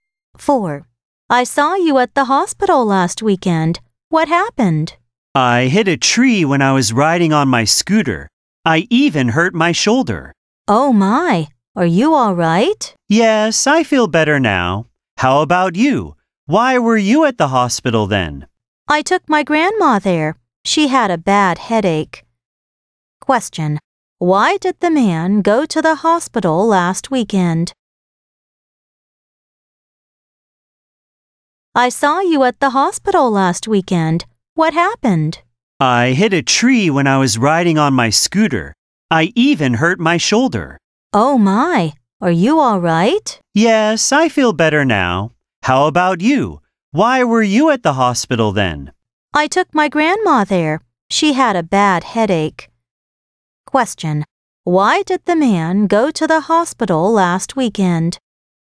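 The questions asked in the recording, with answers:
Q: Why did the man go to the hospital last weekend?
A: He took his grandma there because she had a bad headache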